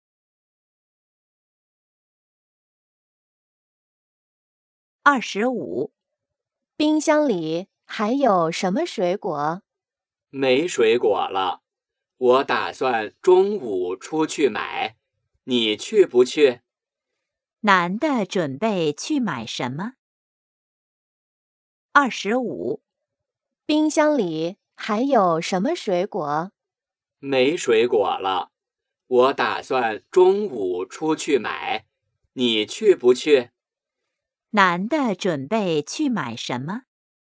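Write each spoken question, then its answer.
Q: 男的准备去买什么?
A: 水果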